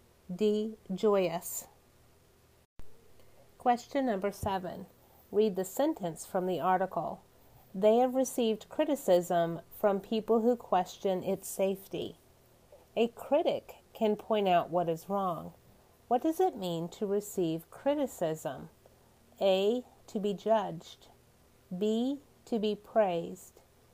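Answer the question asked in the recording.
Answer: A: To be judged.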